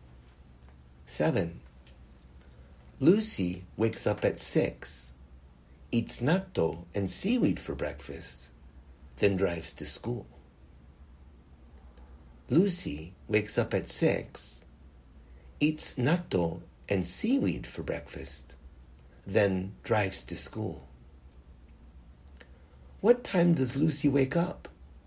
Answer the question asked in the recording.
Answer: Lucy wakes up at 6.